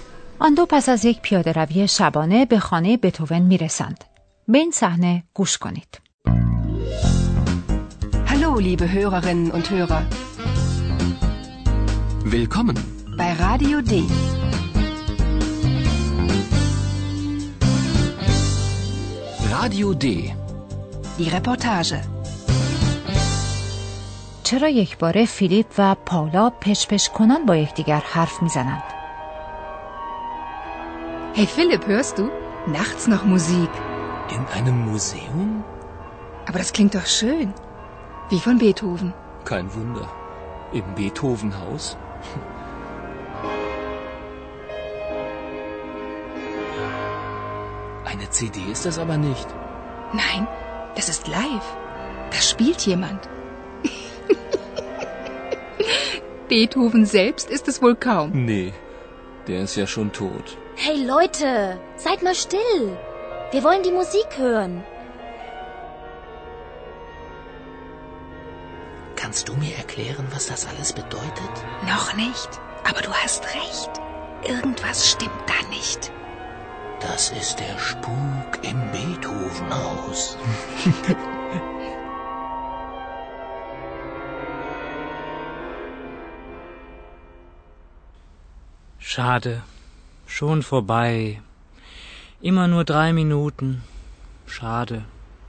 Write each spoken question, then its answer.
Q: چرا یک باره فیلیپ و پاولا پشپش کنان با یکدیگر حرف میزنند؟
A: دو جوان دیگر نیز آنجا هستند که گفتگوی بین فیلیپ و پالا را مزاحمتی برای شنیدن موسیقی میدانند.